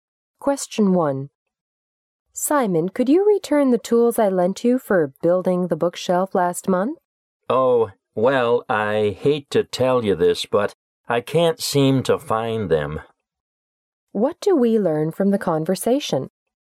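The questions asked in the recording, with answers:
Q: What do we learn from the conversation?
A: Simon can't find the tools he borrowed.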